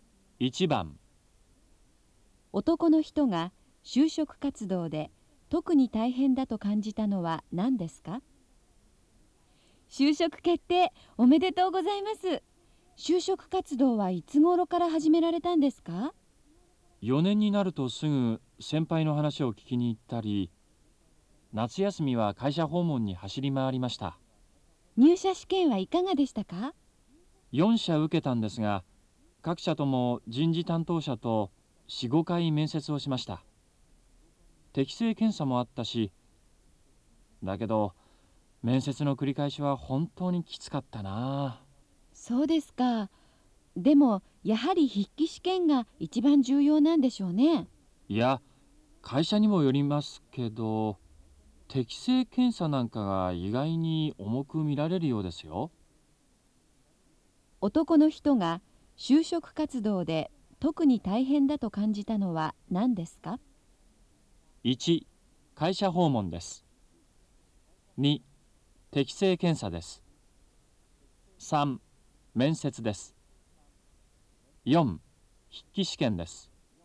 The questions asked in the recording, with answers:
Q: 男の人が就職活動で特に大変だと感じたのは何ですか?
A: 1番、3